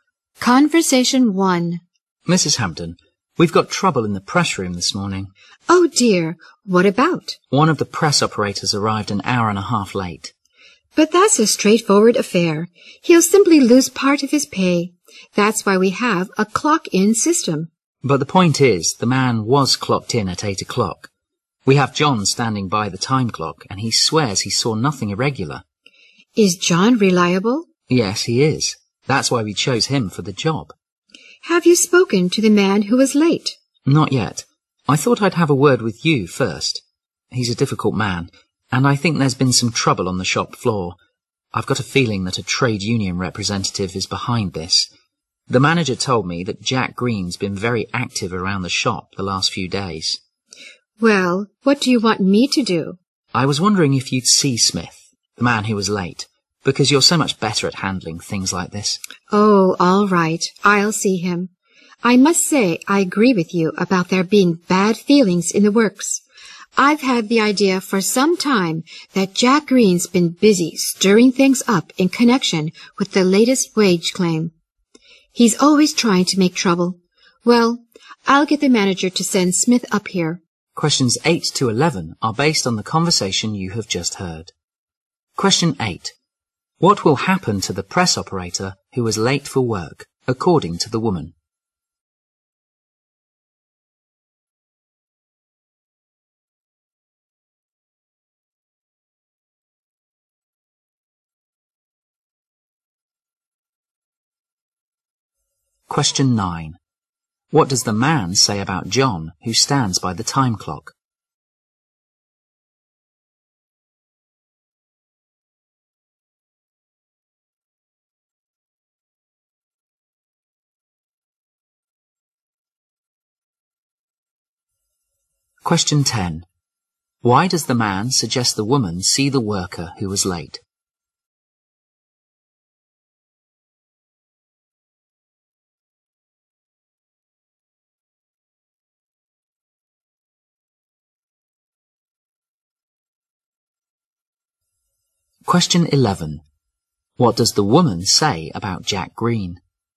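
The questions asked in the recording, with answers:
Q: What will happen to the press operator who was late for work, according to the woman?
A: He will lose part of his pay

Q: What does the man say about John, who stands by the time clock?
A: He is reliable

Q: Why does the man suggest the woman see the worker who was late?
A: She is better at handling such things

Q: What does the woman say about Jack Green?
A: He is always trying to make trouble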